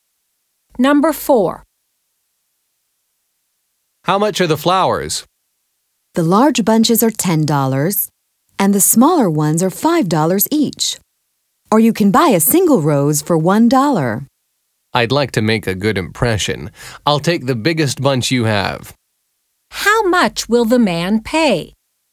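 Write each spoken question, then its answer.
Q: How much will the man pay?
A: $10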